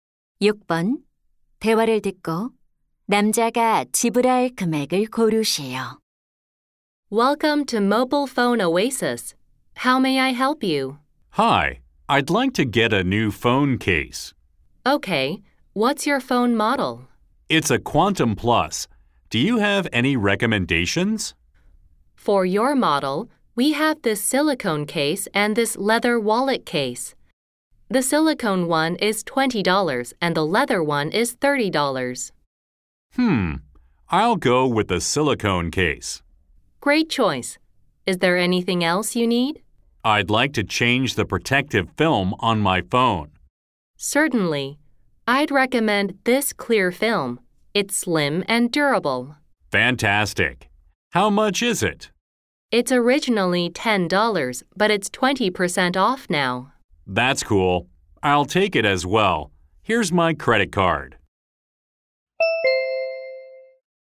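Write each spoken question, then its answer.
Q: 대화를 듣고 남자가 지불할 금액을 고르시오.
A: $28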